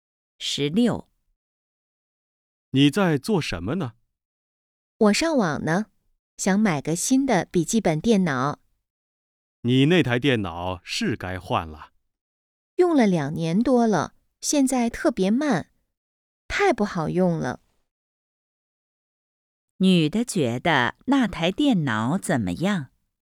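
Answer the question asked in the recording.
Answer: 太慢了,不好用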